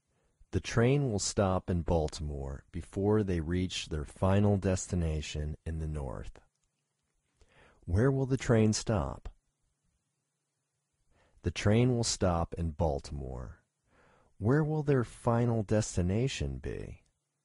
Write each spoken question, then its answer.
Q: Where will their final destination be?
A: Their final destination will be in the north.